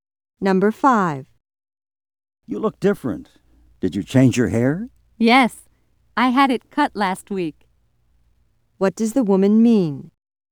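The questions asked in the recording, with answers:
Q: What does the woman mean?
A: She got a haircut last week.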